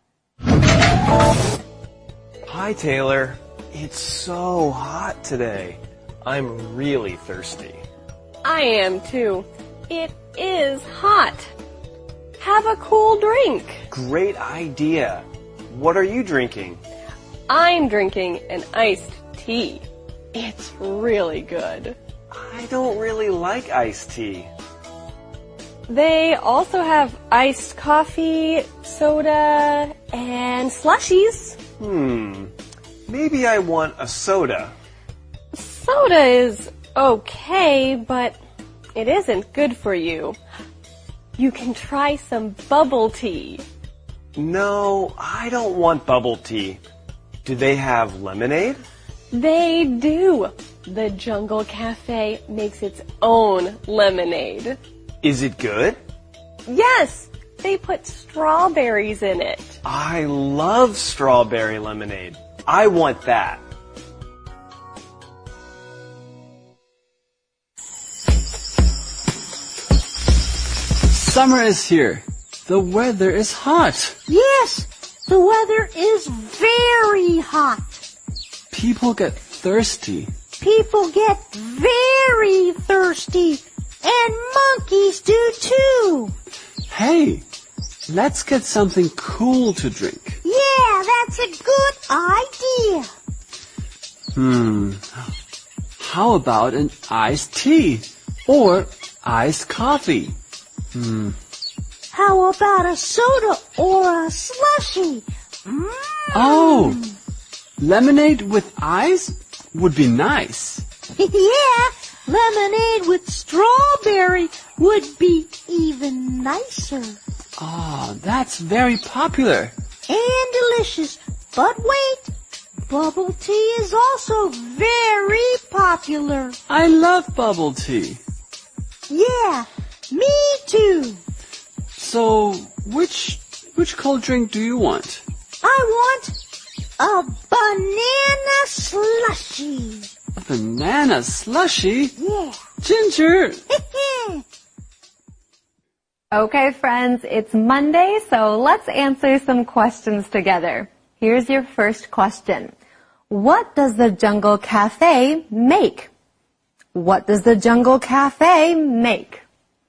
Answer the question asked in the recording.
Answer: The Jungle Cafe makes its own lemonade.